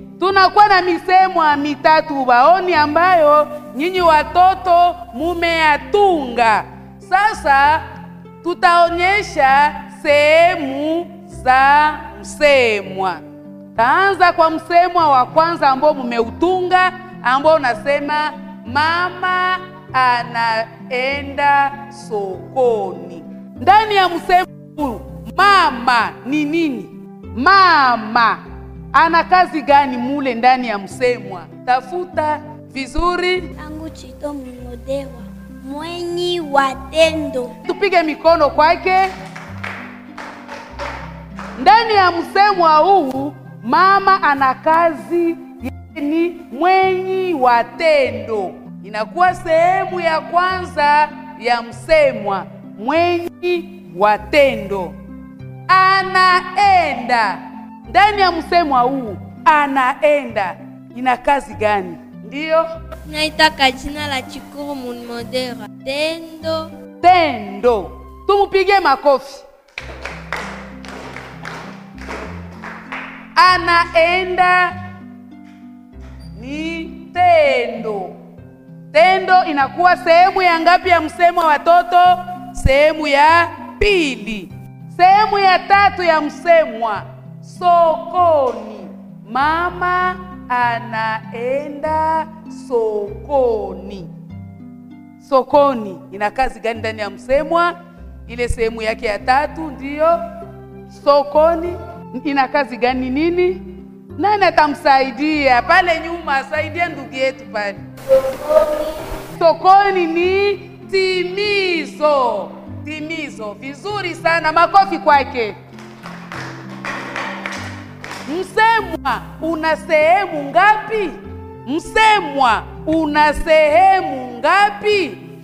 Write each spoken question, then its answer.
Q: Msemwa una sehemu ngapi?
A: Msemwa una sehemu tatu.